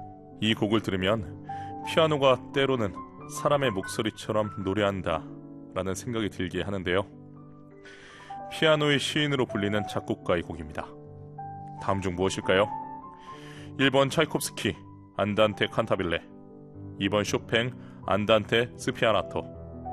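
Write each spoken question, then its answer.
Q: 피아노의 시인으로 불리는 작곡가의 곡입니다. 다음 중 무엇일까요?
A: 2번: 쇼팽 안단테 스피아나토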